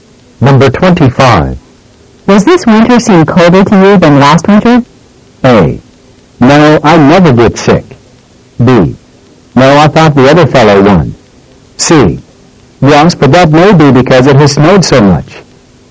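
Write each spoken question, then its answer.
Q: Does this winter seem colder to you than last winter?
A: C: Yes, but that may be because it has snowed so much.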